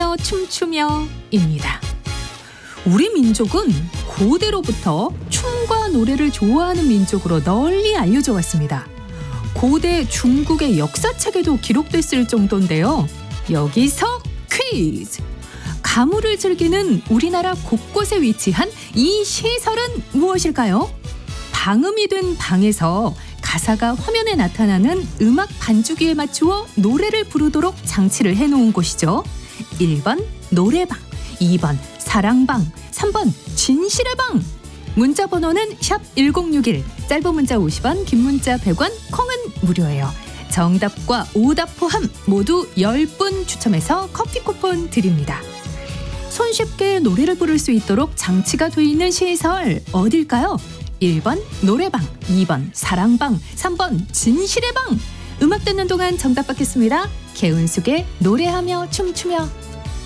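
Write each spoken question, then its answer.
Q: 가무를 즐기는 우리나라 곳곳에 위치한 이 시설은 무엇일까요?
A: 1번: 노래방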